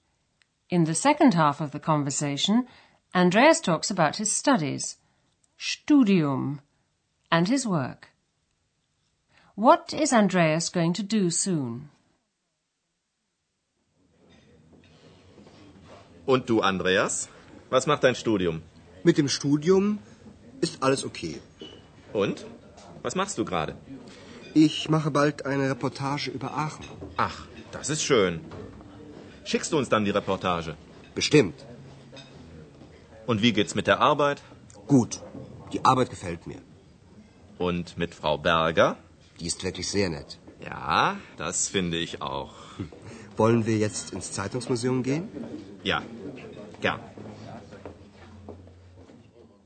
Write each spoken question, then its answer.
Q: What is Andreas going to do soon?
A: Andreas says he's going to do a feature about Aachen.